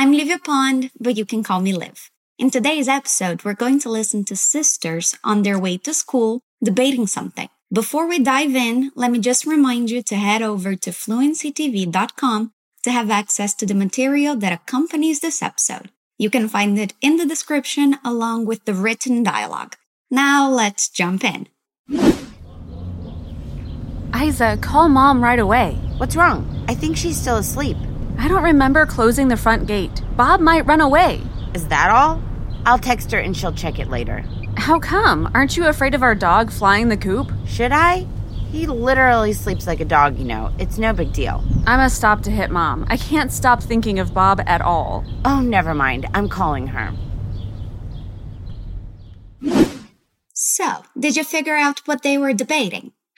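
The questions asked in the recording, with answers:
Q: So, did you figure out what they were debating?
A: Whether to call Mom right away, because the front gate may be open and their dog Bob might run away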